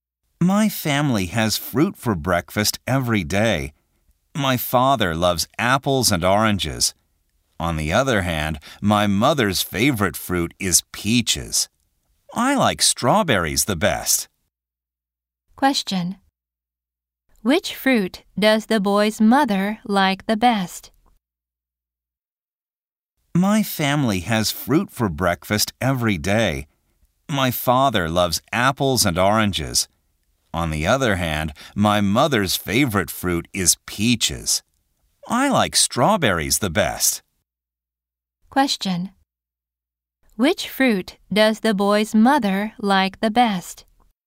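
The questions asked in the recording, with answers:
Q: Which fruit does the boy's mother like the best?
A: Peaches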